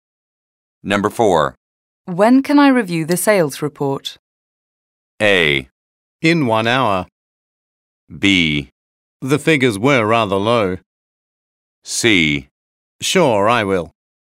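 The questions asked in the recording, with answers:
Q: When can I review the sales report?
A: A: In 1 hour.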